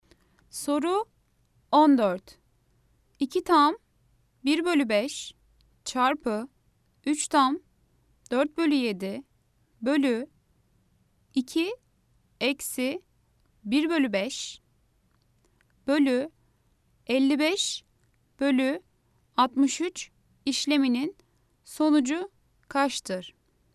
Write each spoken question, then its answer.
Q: 2 tam 1 bölü 5 çarpı 3 tam 4 bölü 7 bölü 2 eksi 1 bölü 5 bölü 55 bölü 63 işleminin sonucu kaçtır?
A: Cevap Adana 5.